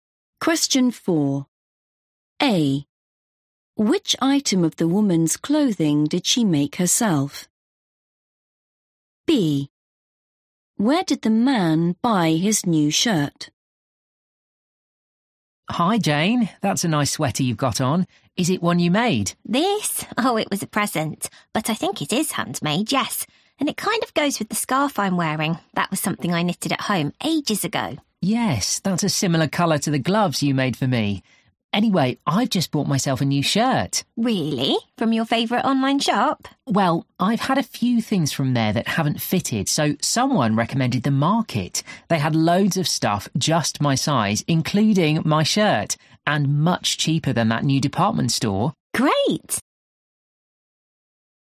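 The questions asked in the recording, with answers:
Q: Which item of the woman's clothing did she make herself?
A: the scarf

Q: Where did the man buy his new shirt?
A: The Market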